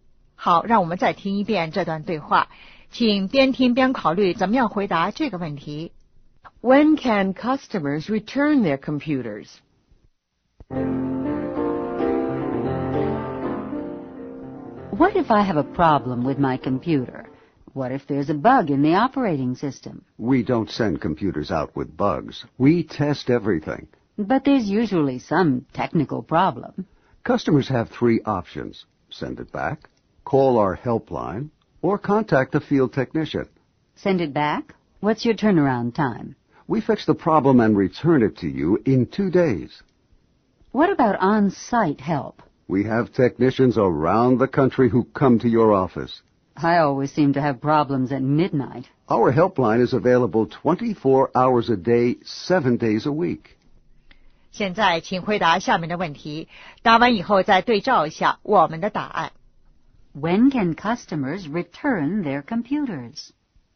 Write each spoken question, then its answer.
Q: When can customers return their computers?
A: If there's a problem.